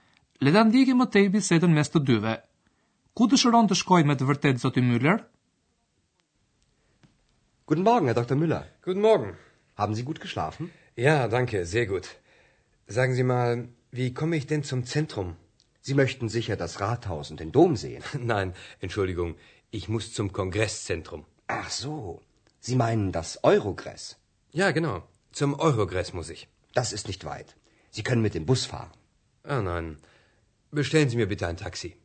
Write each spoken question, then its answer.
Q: Ku dëshiron të shkoj me të vërtet Zoti Müller?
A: Zoti Myler nuk dëshiron të shkoj në qendrën e qytetit, por në qendrën e kongreseve.